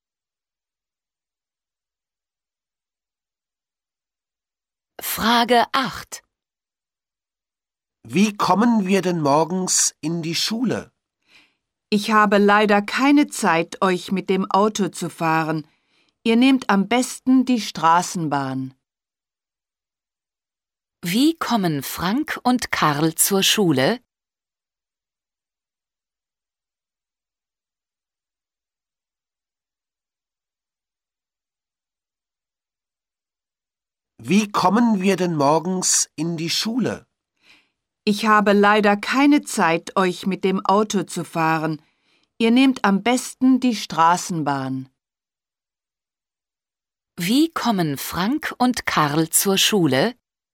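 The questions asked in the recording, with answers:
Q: Wie kommen Frank und Karl zur Schule?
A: Mit der Straßenbahn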